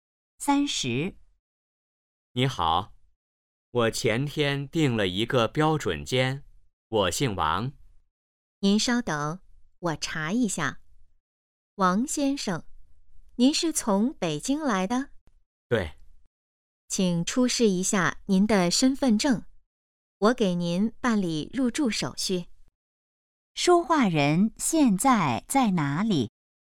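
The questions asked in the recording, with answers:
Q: 说话人现在在哪里?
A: 宾馆(酒店)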